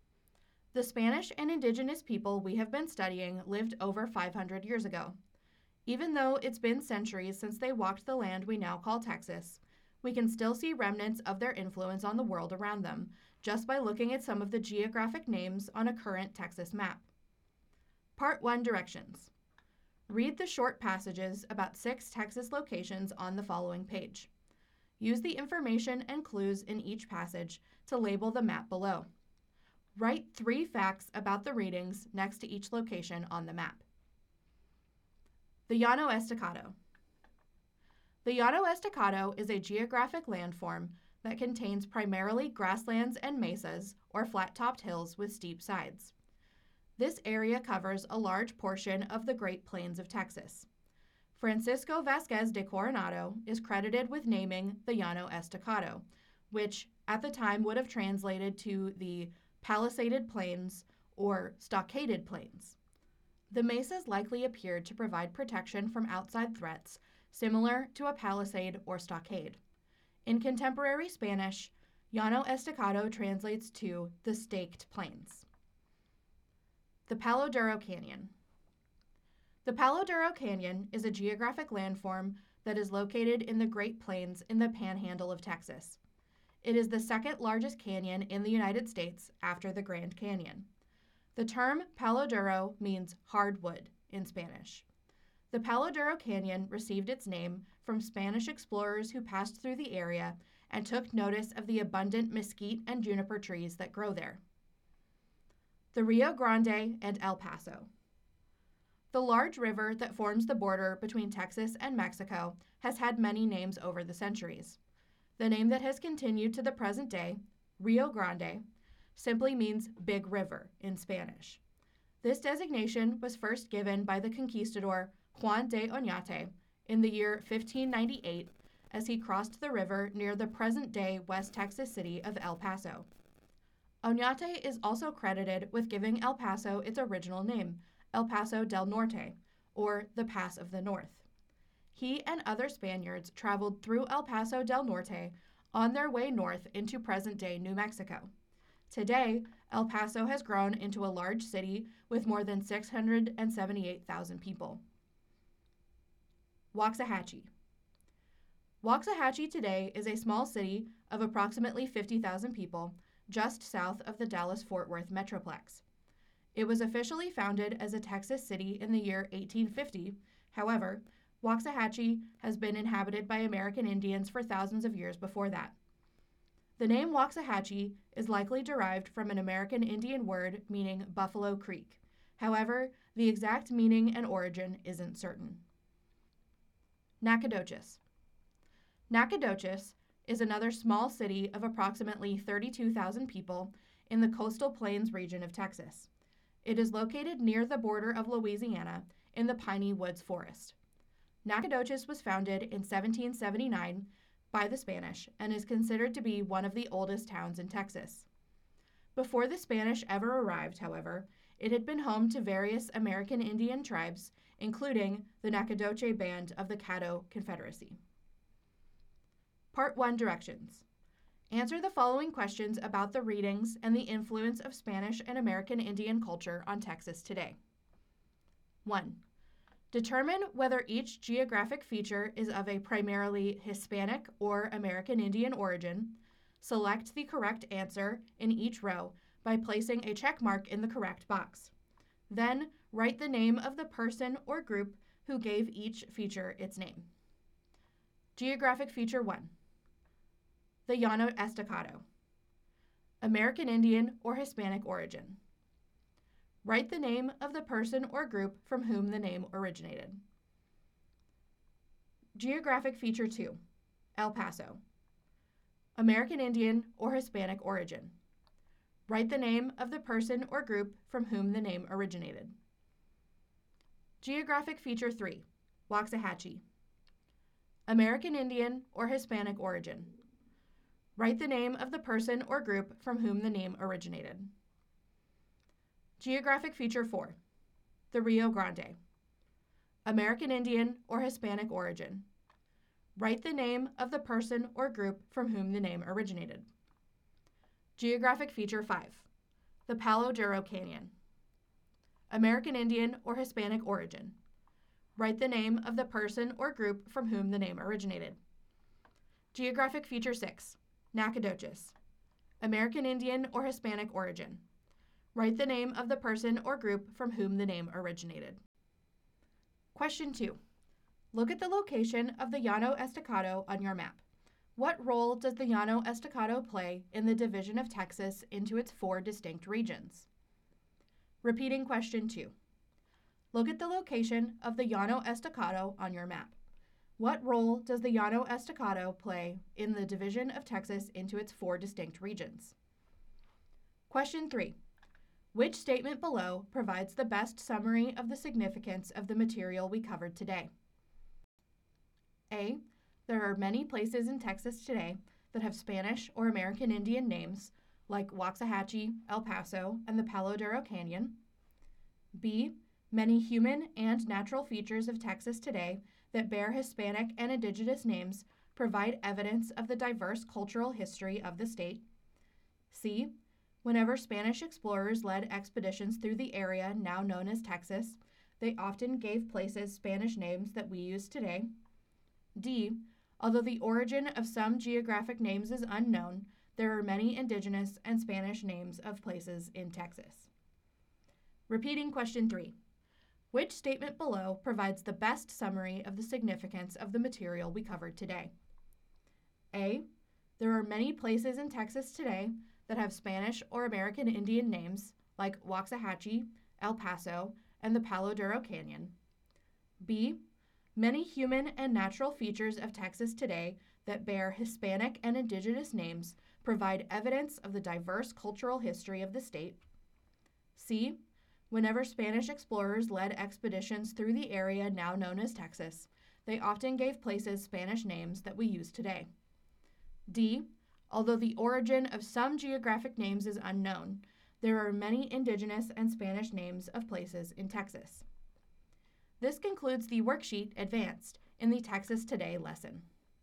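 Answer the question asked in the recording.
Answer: B: Many human and natural features of Texas today that bear Hispanic and indigenous names provide evidence of the diverse cultural history of the state.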